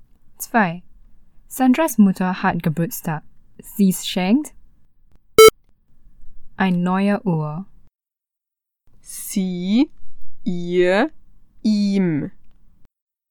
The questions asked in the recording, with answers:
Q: Sandras Mutter hat Geburtstag. Sie schenkt ein neue Uhr. Sie, ihr, ihm.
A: Sie schenkt ihr eine neue Uhr.